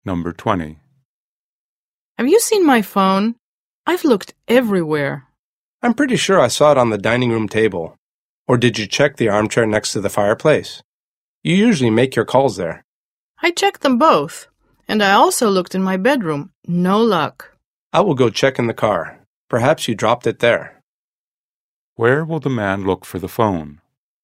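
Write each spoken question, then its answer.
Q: Where will the man look for the phone?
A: In the car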